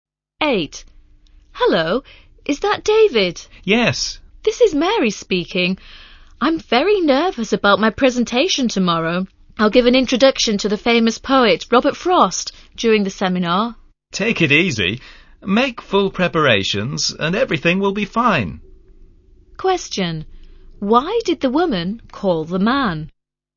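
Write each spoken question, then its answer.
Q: Why did the woman call the man?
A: Because she was nervous about her presentation tomorrow.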